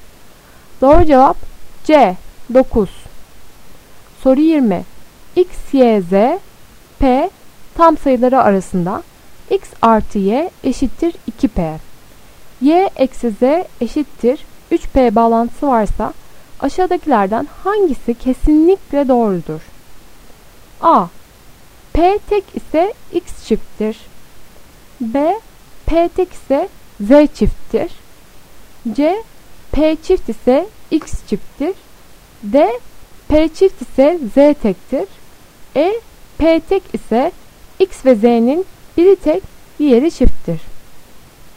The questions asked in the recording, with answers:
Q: Y eksi Z eşittir 3P bağlantısı varsa aşağıdakilerden hangisi kesinlikle doğrudur?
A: Doğru cevap E. P tek ise x ve z'nin biri tek, diğeri çifttir.